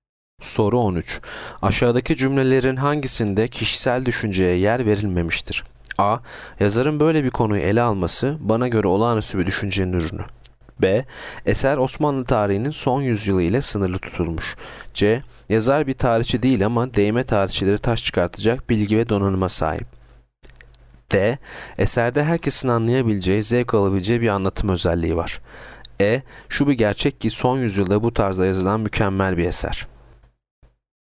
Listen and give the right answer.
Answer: Yanıt B. Eser Osmanlı tarihinin son yüzyılı ile sınırlı tutulmuş.